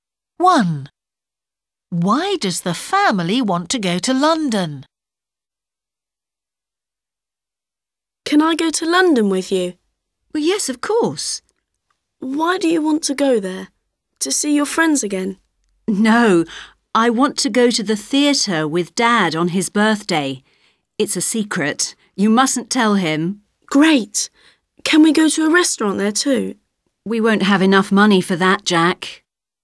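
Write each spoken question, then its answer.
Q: Why does the family want to go to London?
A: to go to the theatre for Dad's birthday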